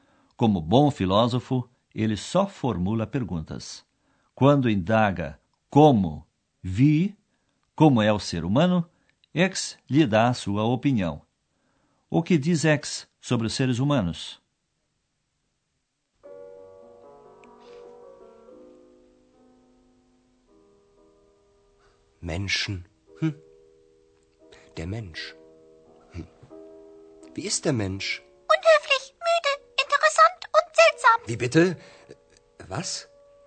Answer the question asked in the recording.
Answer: Pois é, X pensa que sabe como são os seres humanos.